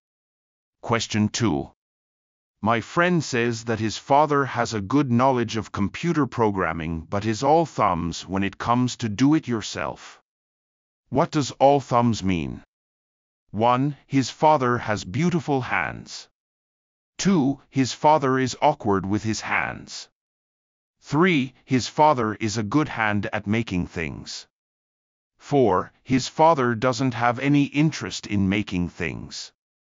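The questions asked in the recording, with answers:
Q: What does all thumbs mean?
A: 2: His father is awkward with his hands.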